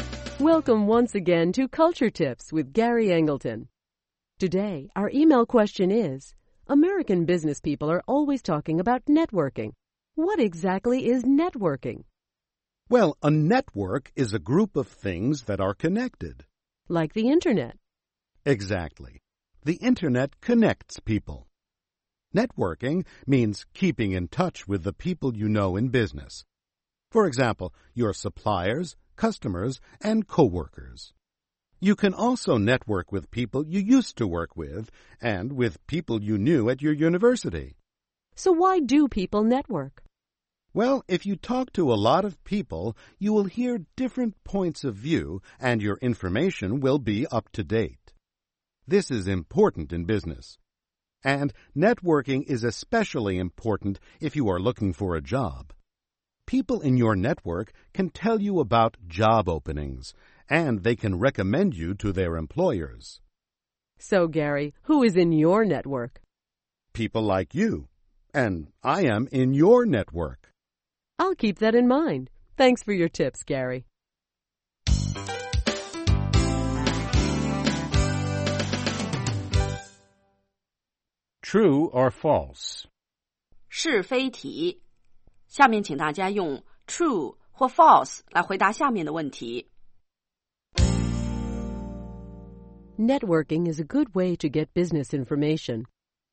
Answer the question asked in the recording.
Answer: True. The people in your network can give you a lot of up-to-date information.